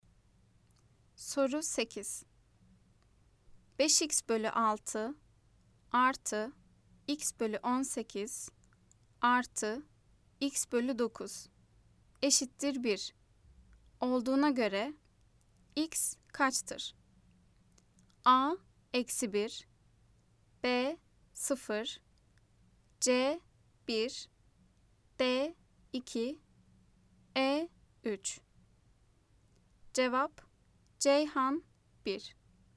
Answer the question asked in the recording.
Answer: Cevap Ceyhan 1.